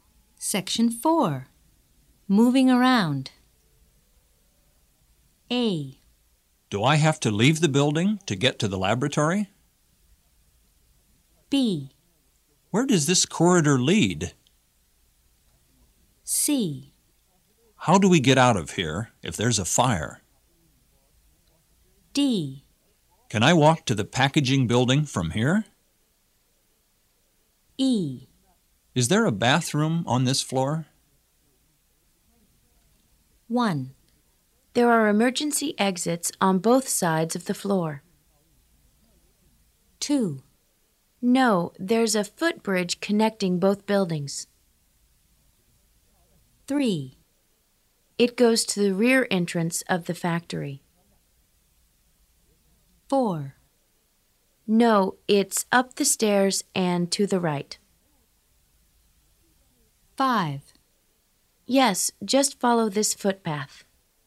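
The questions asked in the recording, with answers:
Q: There are emergency exits on both sides of the floor.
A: C: How do we get out of here if there's a fire?

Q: No, there's a footbridge connecting both buildings.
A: A: Do I have to leave the building to get to the laboratory?

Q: It goes to the rear entrance of the factory.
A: B: Where does this corridor lead?

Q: No, it's up the stairs and to the right.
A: E: Is there a bathroom on this floor?

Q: Yes, just follow this footpath.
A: D: Can I walk to the packaging building from here?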